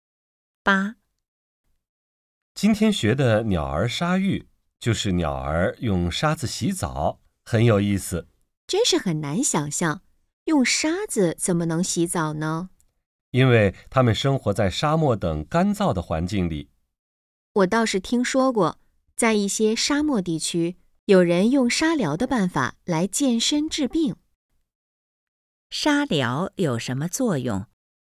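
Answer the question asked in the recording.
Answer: 健身治病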